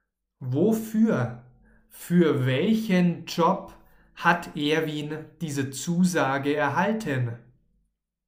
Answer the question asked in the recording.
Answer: Für den Job als Weihnachtsmann.